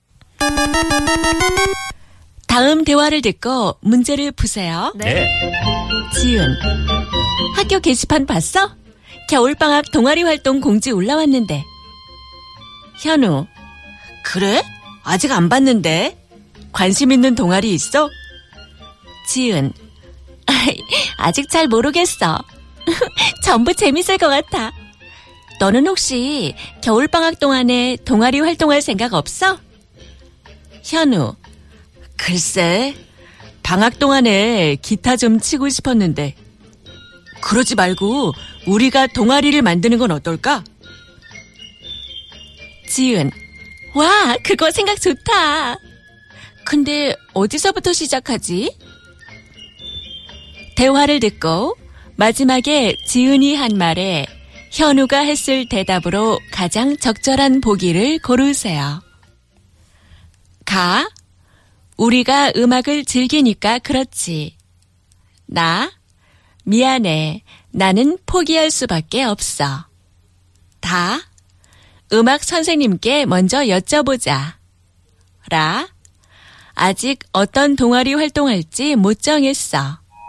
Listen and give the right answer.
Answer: Of course, it was da. It was da.